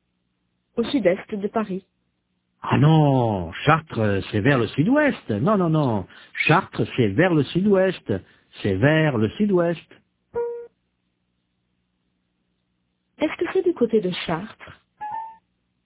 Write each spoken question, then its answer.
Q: Est-ce que c'est du côté de Chartres?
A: Non, Chartres, c'est vers le sud-ouest.